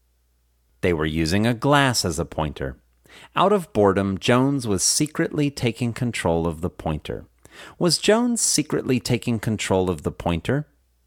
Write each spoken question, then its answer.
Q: Was Jones secretly taking control of the pointer?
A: Yes, Jones was secretly taking control of the pointer.